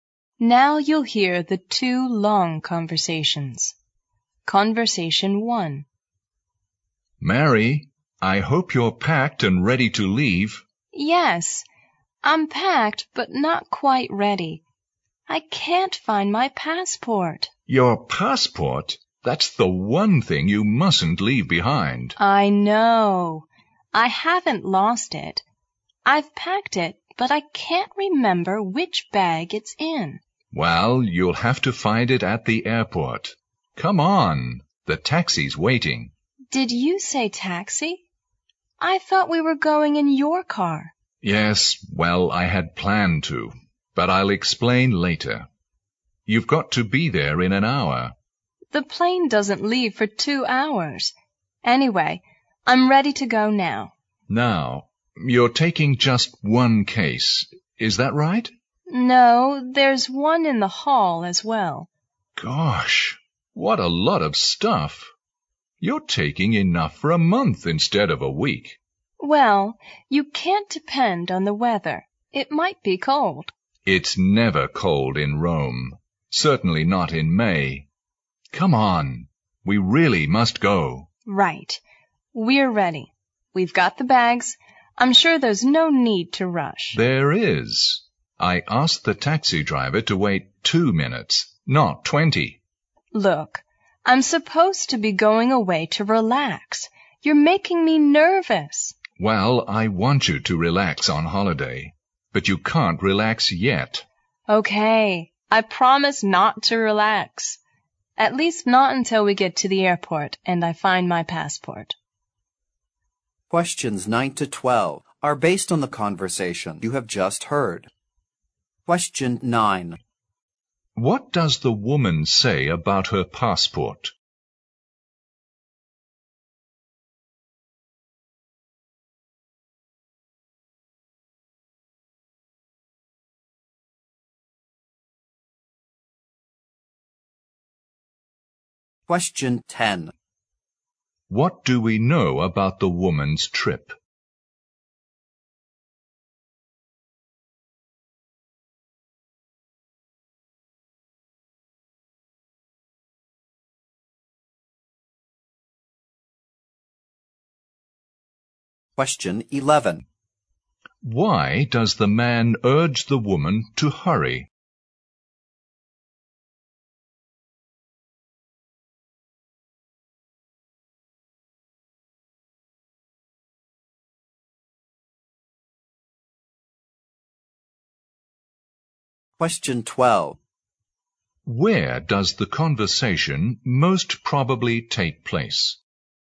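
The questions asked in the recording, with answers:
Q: What does the woman say about her passport?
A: She has packed it but can't remember which bag it's in.

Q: What do we know about the woman's trip?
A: She is going to Rome for a week in May.

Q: Why does the man urge the woman to hurry?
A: The taxi is waiting; he asked the driver to wait only 2 minutes.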